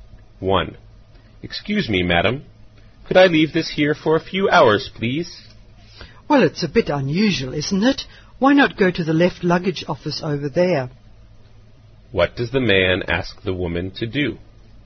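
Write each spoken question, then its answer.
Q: What does the man ask the woman to do?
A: Look after his luggage for a few hours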